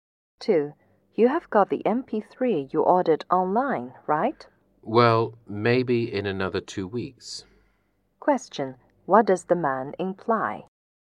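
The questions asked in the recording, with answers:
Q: What does the man imply?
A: He hasn't received the MP3 yet; it may take another 2 weeks.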